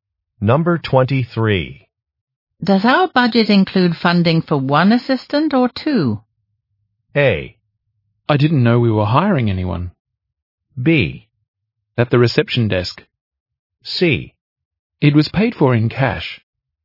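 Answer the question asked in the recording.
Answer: A: I didn't know we were hiring anyone.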